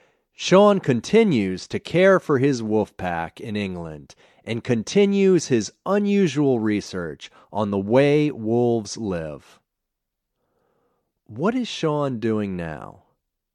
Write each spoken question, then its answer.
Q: What is Sean doing now?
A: He continues to care for his wolf pack in England, and he continues his unusual research on the way wolves live.